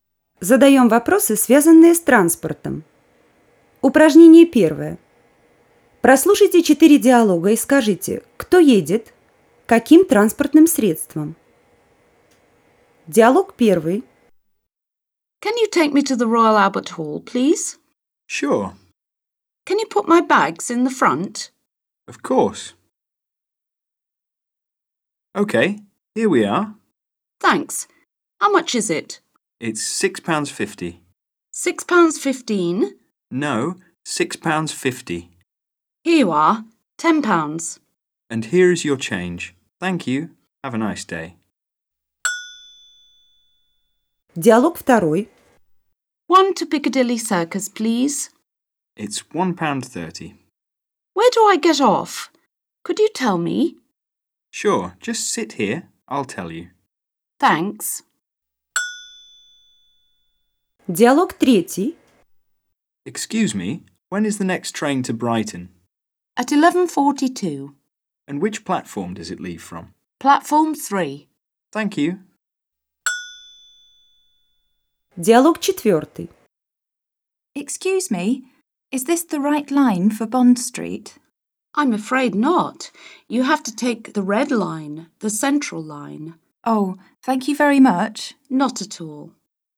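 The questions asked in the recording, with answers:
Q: Прослушайте 4 диалога и скажите, кто едет, каким транспортным средством.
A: 1 — на такси, 2 — на автобусе, 3 — на поезде, 4 — на метро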